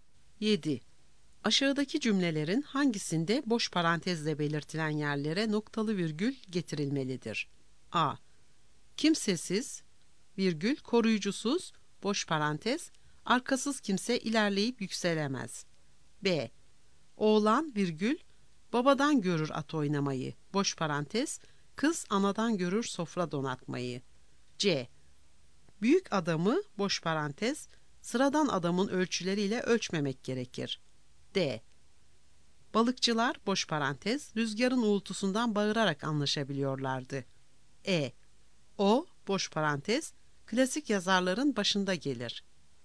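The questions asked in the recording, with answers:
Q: Aşağıdaki cümlelerin hangisinde boş parantezle belirtilen yerlere noktalı virgül getirilmelidir?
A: B: Oğlan babadan görür at oynamayı, kız anadan görür sofra donatmayı.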